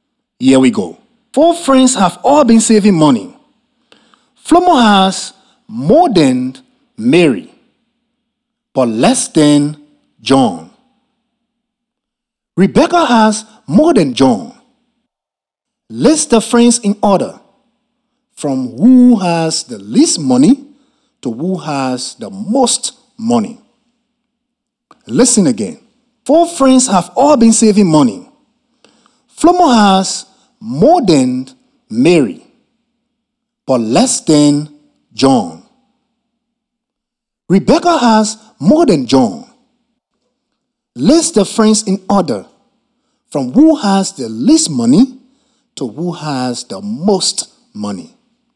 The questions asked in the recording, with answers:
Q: List the friends in order from who has the least money to who has the most money.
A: I know that Mary has the least money, followed by Flomo, then John, then Rebecca has the most money.